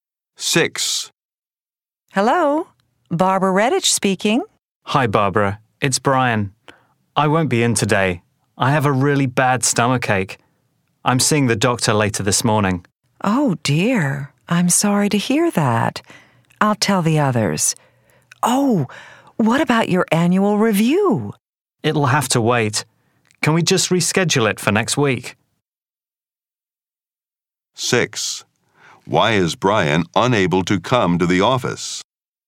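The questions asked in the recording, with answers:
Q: Why is Brian unable to come to the office?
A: He has a bad stomachache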